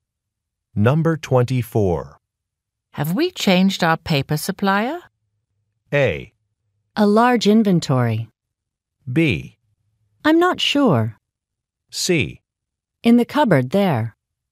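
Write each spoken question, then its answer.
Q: Have we changed our paper supplier?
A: B: I'm not sure.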